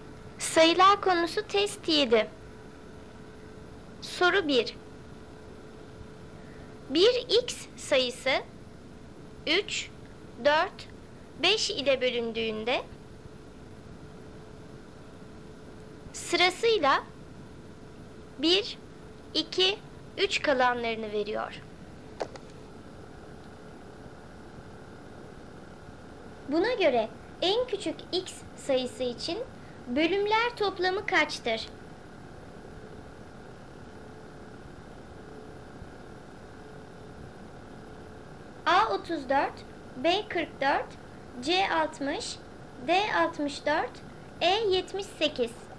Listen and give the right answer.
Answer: Doğru cevap B 44.